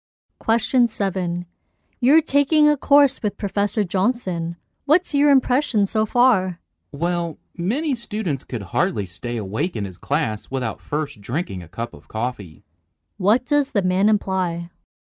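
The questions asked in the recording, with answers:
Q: What does the man imply?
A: Professor Johnson's class is boring.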